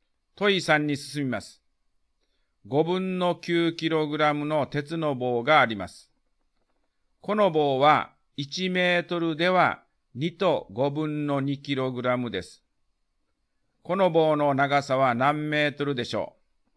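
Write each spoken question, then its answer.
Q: この棒の長さは何メートルでしょう。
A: 4分の3メートル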